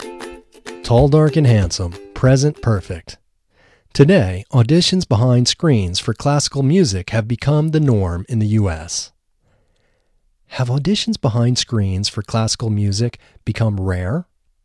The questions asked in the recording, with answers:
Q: Have auditions behind screens for classical music become rare?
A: No, auditions behind screens for classical music haven't become rare.